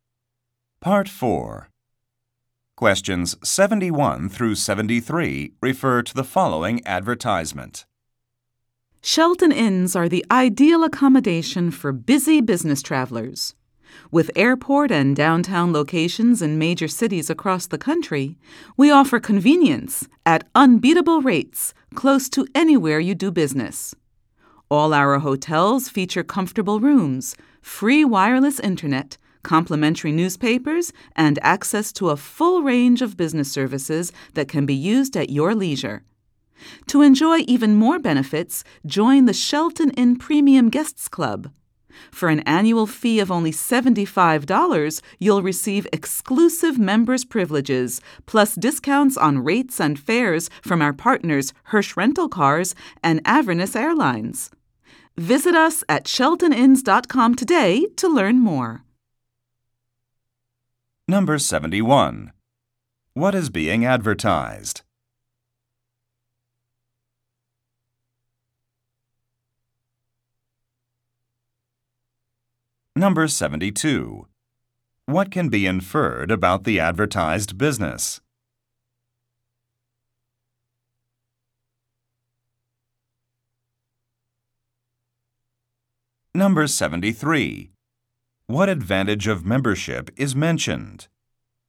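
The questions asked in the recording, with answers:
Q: What is being advertised?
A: A hotel chain (Shelton Inns)

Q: What advantage of membership is mentioned?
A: Discounts on car rentals and airfares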